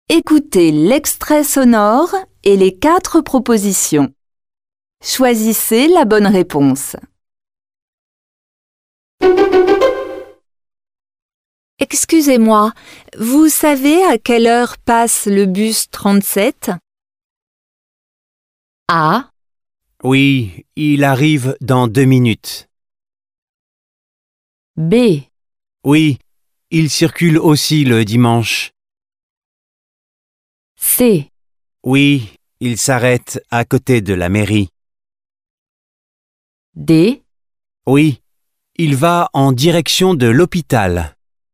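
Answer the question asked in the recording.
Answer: A: Oui, il arrive dans 2 minutes.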